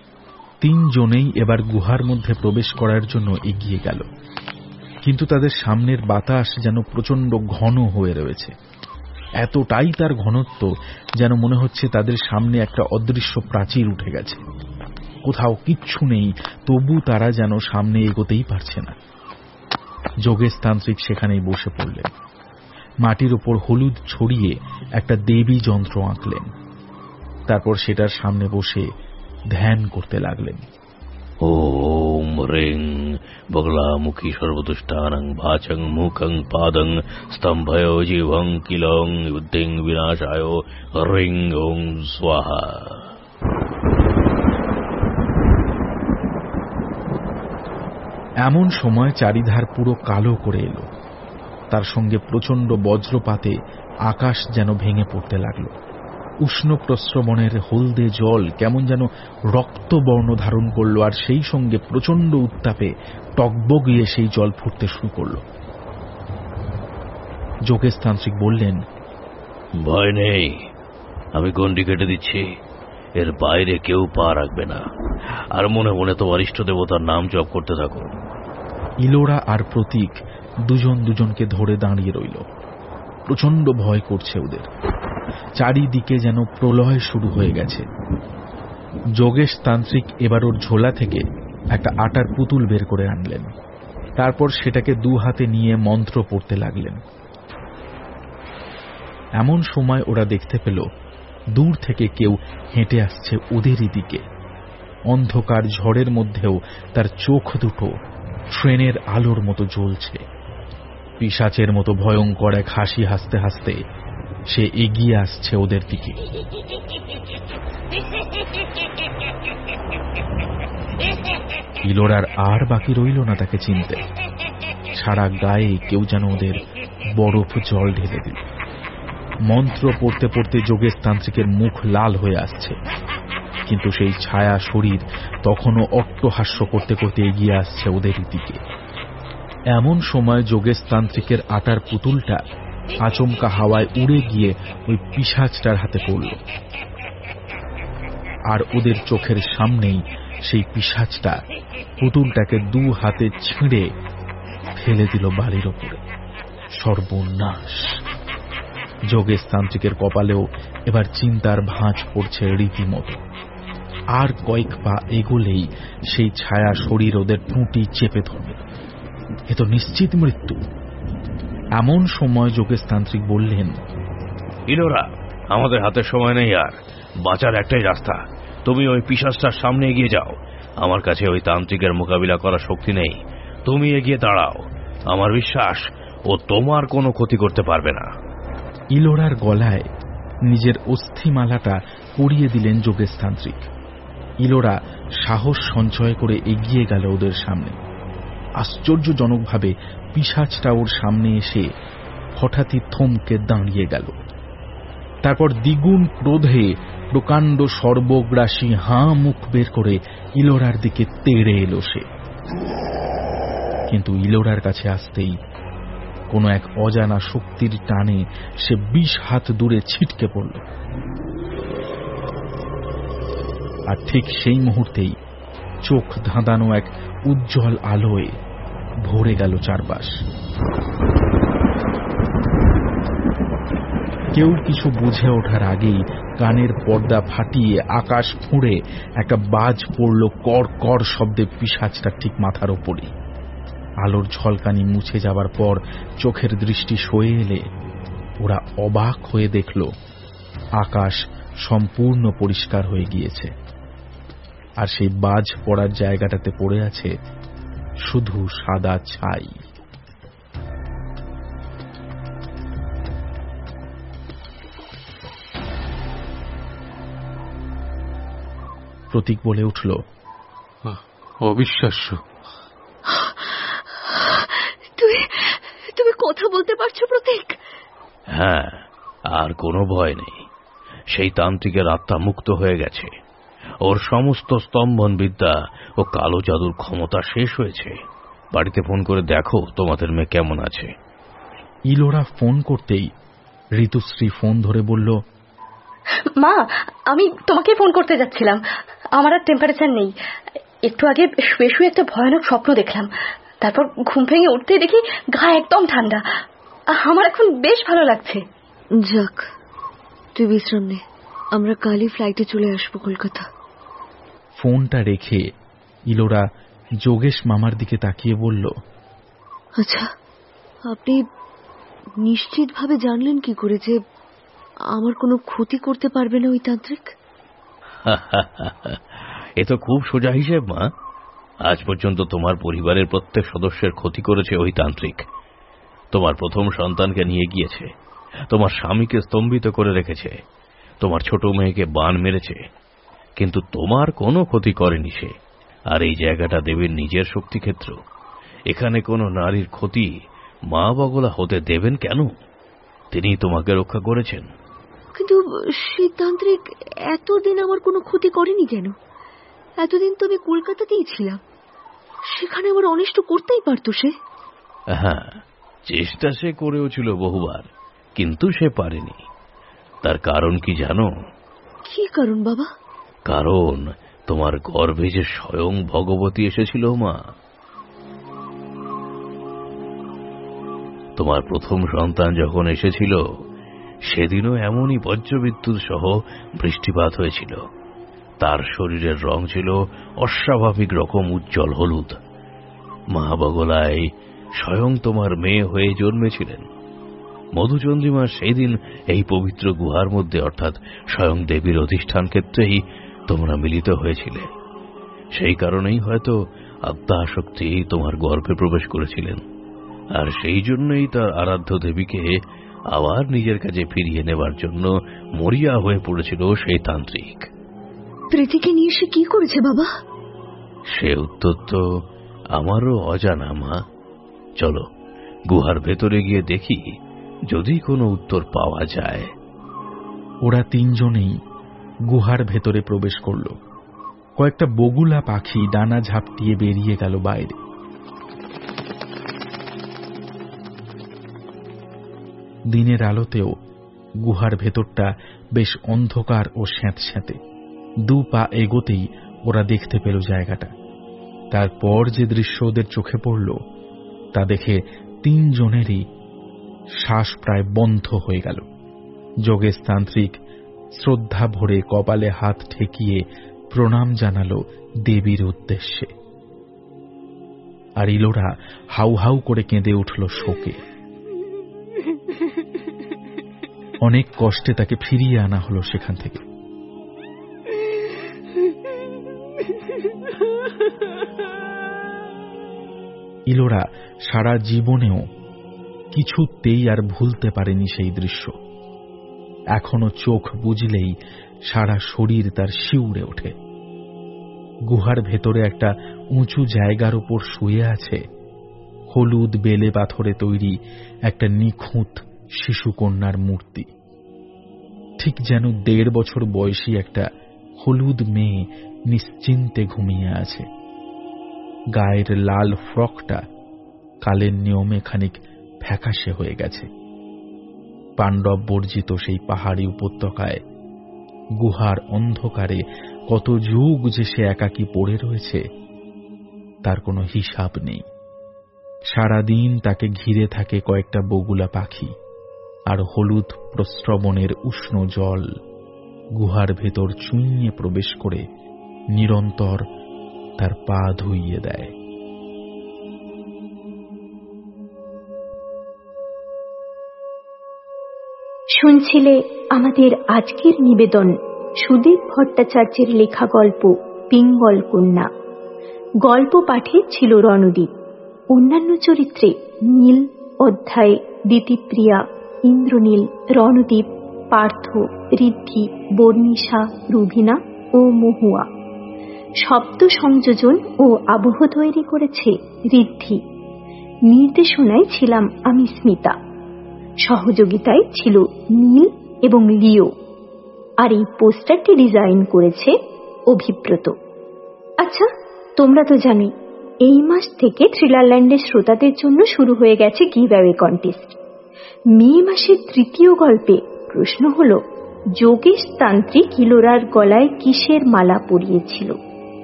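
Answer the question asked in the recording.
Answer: অস্থিমালা (হাড়ের তৈরি মালা)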